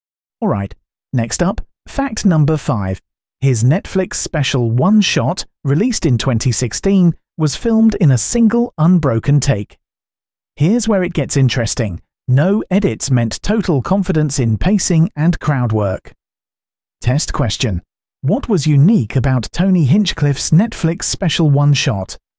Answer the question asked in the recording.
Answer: Correct answer, filmed in a single take.